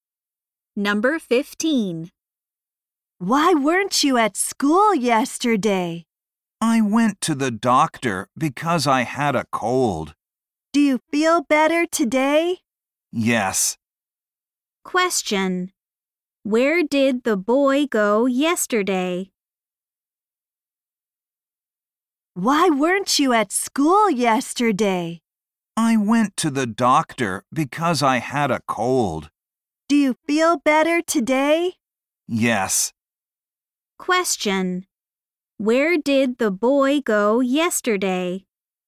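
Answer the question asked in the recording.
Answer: To the doctor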